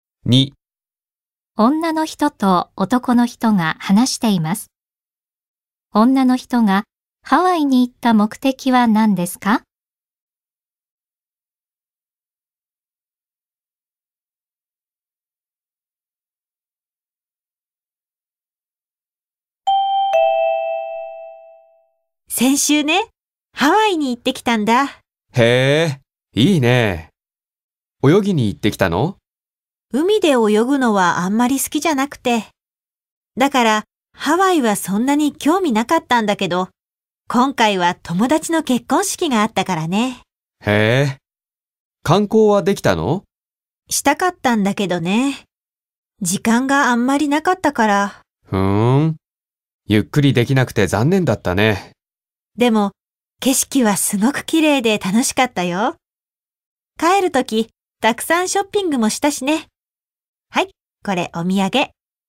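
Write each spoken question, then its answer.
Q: 女の人と男の人が話しています。女の人がハワイに行った目的は何ですか?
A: 友達の結婚式に出るため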